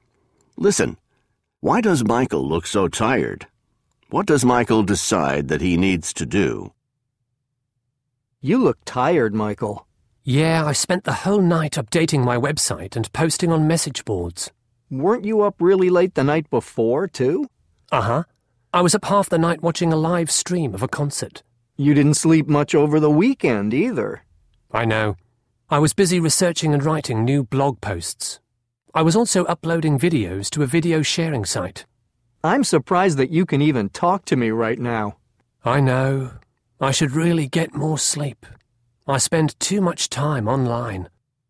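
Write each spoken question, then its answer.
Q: Why does Michael look so tired?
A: He spent the whole night updating his website and posting on message boards (he has been online too much).

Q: What does Michael decide that he needs to do?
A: He needs to get more sleep (he spends too much time online).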